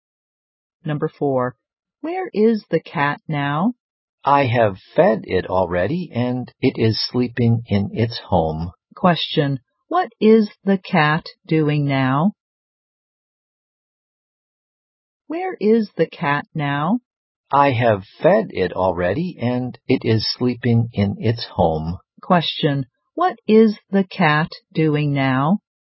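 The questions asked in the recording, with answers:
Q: Question, what is the cat doing now?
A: Sleeping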